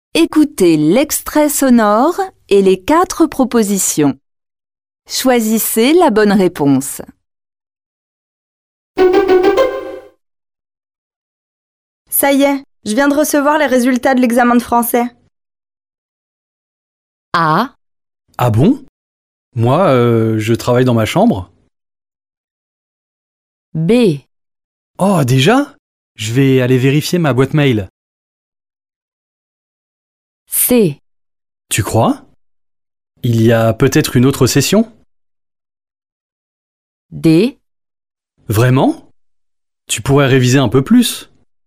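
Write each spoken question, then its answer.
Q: Ça y est, je viens de recevoir les résultats de l'examen de français.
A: B: Oh, déjà ? Je vais aller vérifier ma boîte mail.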